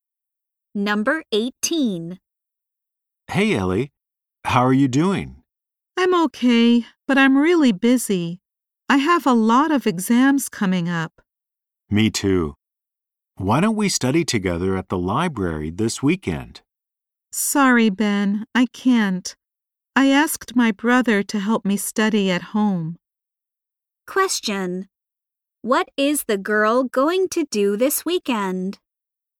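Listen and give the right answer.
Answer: Study at home with her brother.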